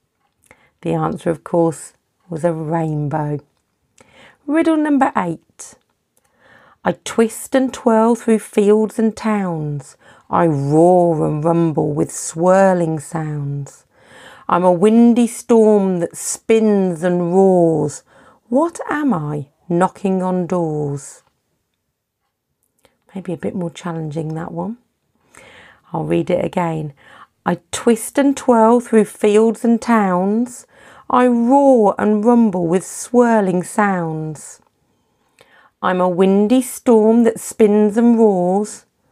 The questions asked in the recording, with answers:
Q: What am I knocking on doors?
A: It was a tornado